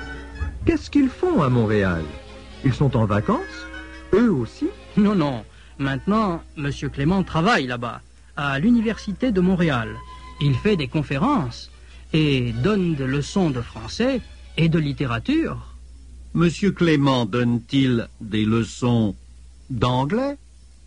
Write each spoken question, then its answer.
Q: Monsieur Clément donne-t-il des leçons d'anglais?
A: Non, il ne donne pas de leçons d'anglais.